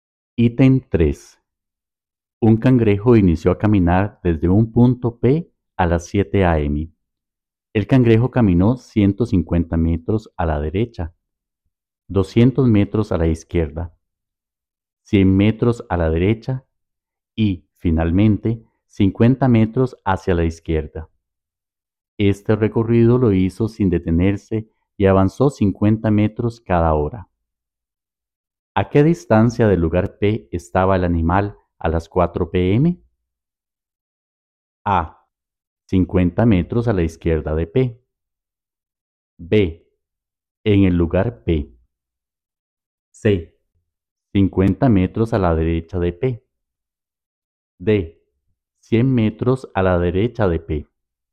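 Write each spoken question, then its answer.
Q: ¿A qué distancia del lugar P estaba el animal a las 4 p.m.?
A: C: 50 metros a la derecha de P.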